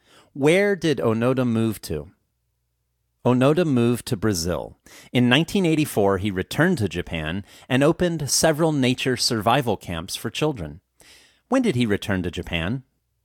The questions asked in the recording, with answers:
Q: When did he return to Japan?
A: He returned to Japan in 1984.